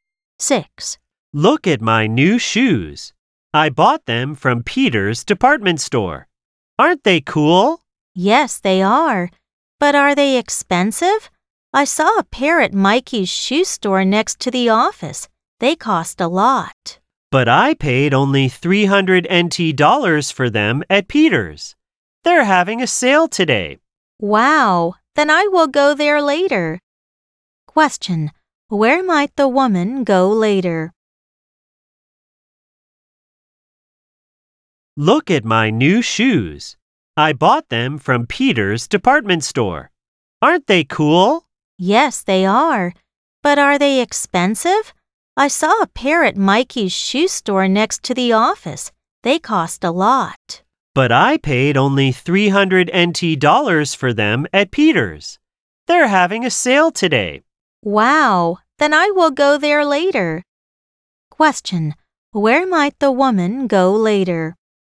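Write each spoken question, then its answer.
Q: where might the woman go later?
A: Peter's department store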